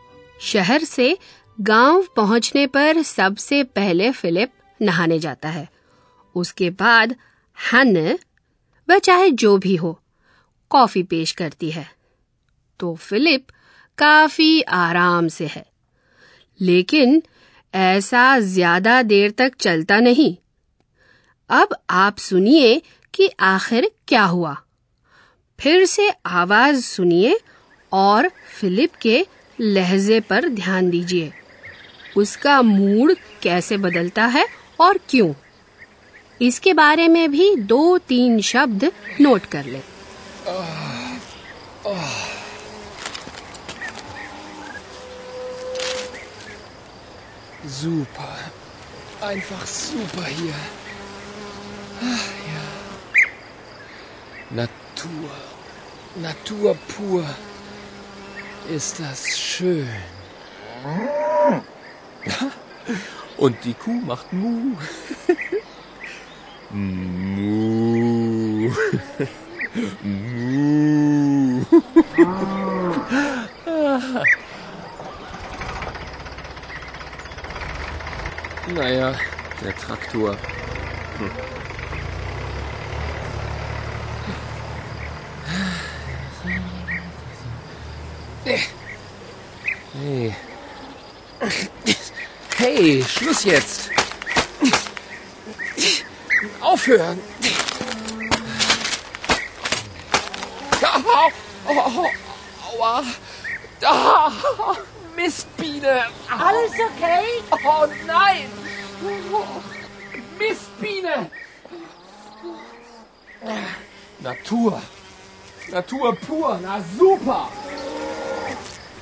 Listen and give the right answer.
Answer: जैसे ही एक Philip को काटती है तो उसका अच्छा मूड बिगड़ जाता है